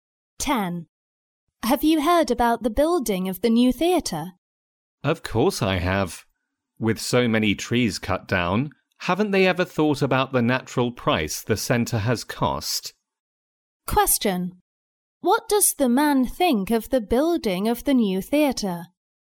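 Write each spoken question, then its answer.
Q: What does the man think of the building of the new theatre?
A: He disapproves because it has harmed nature, with many trees cut down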